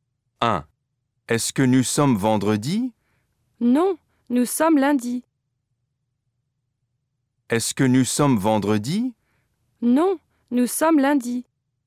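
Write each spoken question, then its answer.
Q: Est-ce que nous sommes vendredi?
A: non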